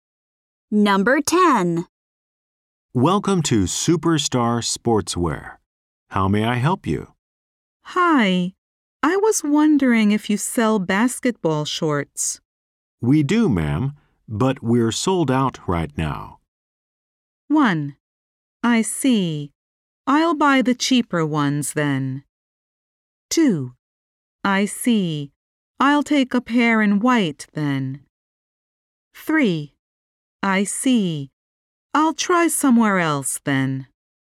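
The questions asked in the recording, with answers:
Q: We do, ma'am, but we're sold out right now.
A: 3: I see. I'll try somewhere else then.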